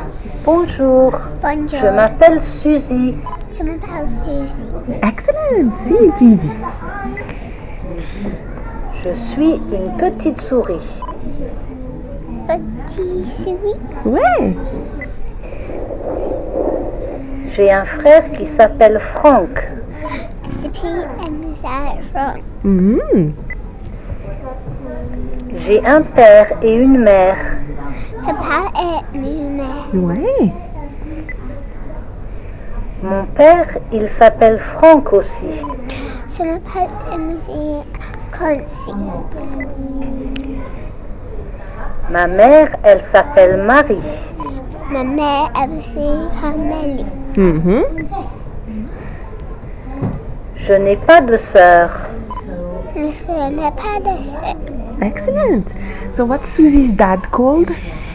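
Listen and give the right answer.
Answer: Franck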